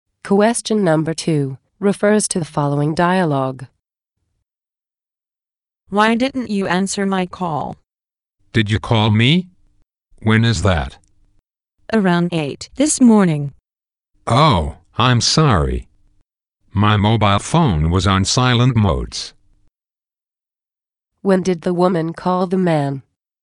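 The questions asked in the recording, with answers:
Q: When did the woman call the man?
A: Around 8 this morning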